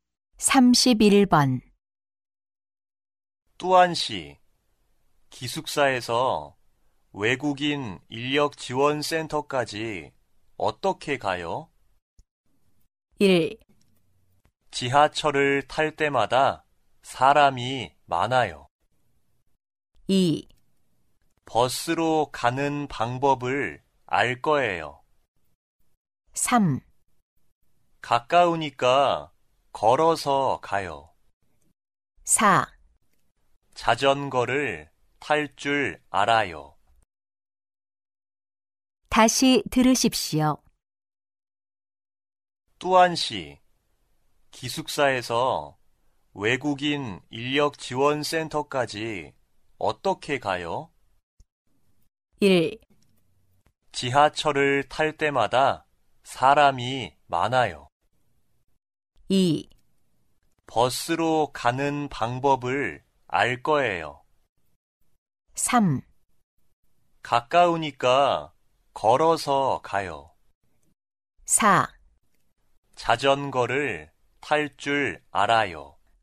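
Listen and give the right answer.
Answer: 3: 가까우니까 걸어서 가요.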